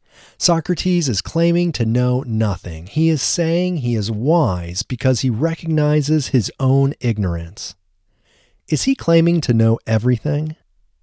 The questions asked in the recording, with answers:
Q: Is he claiming to know everything?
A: No, he isn't claiming to know everything.